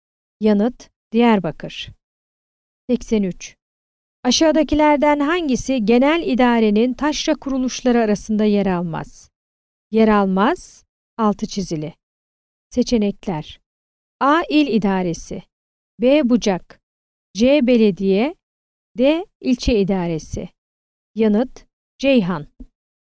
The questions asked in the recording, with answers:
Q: Aşağıdakilerden hangisi genel idarenin taşra kuruluşları arasında yer almaz?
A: Yanıt: Ceyhan.